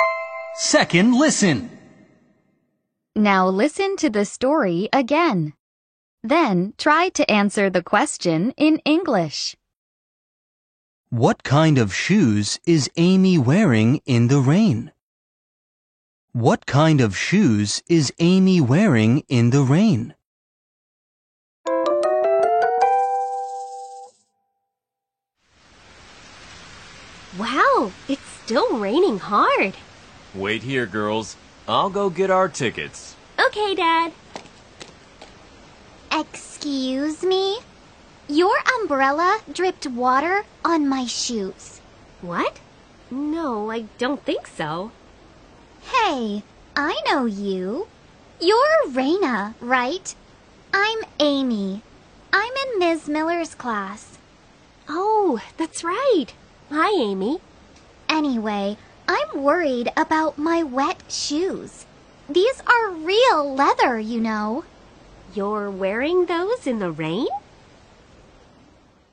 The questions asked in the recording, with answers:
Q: What kind of shoes is Amy wearing in the rain?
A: The answer is leather shoes.